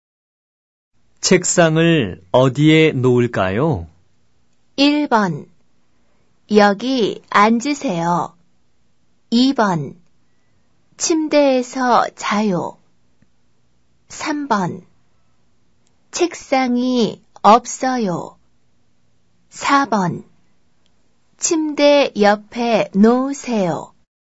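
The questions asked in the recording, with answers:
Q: 책상을 어디에 놓을까요?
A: 4: 침대 옆에 놓으세요.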